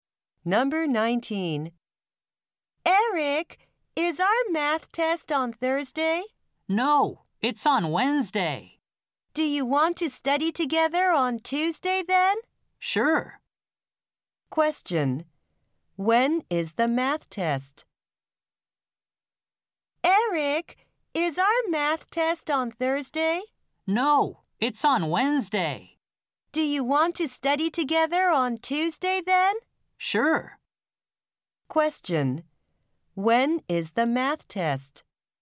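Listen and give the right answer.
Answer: On Wednesday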